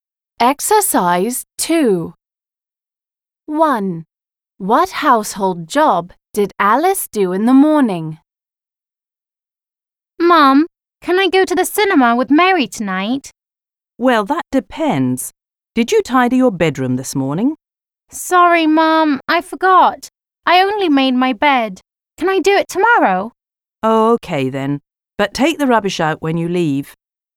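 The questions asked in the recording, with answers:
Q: What household job did Alice do in the morning?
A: She made her bed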